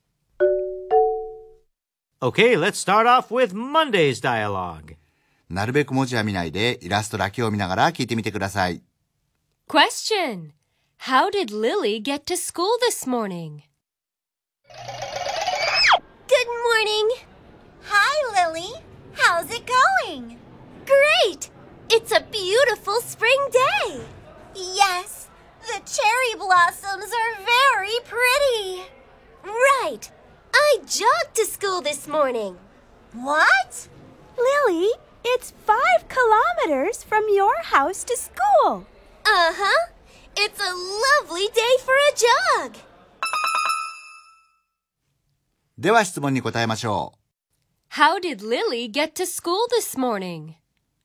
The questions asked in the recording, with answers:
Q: How did Lily get to school this morning?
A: The answer is, She jogged to school this morning.